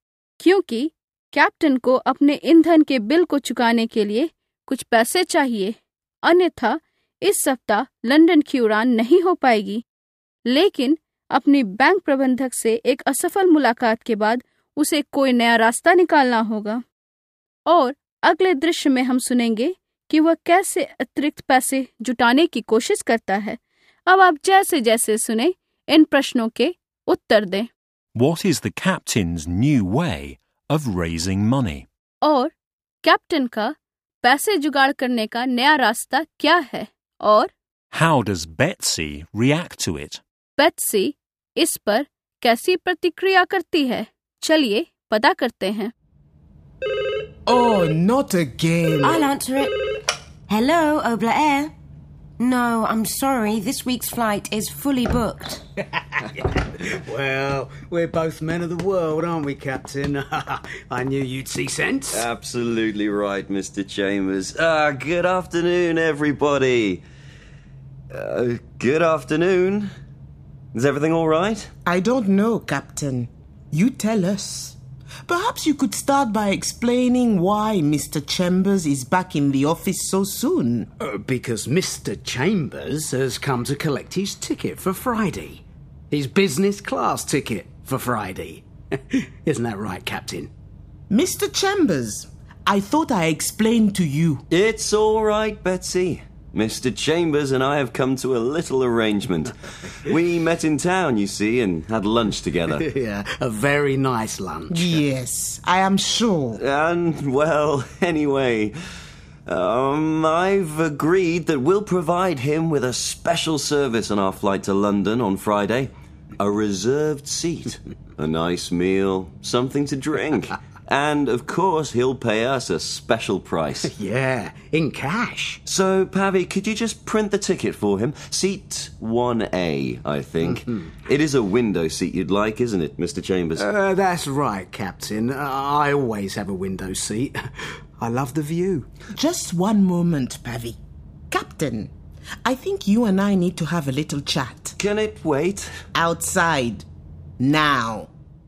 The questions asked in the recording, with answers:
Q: How does Betsy react to it?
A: She's not happy. She says to the captain, I think you and I need to have a little chat. Outside, now.